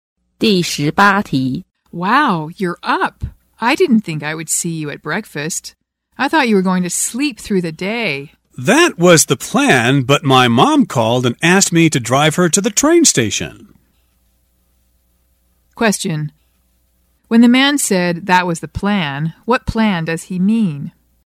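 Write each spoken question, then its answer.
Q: When the man said that was the plan, what plan does he mean?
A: To sleep through the day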